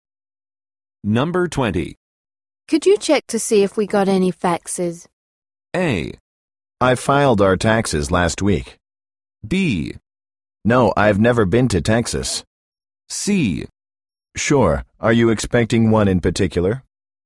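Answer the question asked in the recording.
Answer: C: Sure, are you expecting one in particular?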